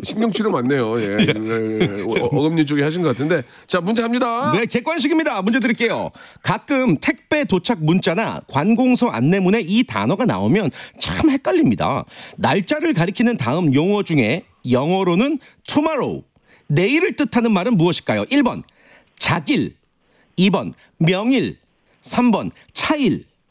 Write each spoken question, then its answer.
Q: 날짜를 가리키는 다음 용어 중에 영어로는 tomorrow, 내일을 뜻하는 말은 무엇일까요?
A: 정답.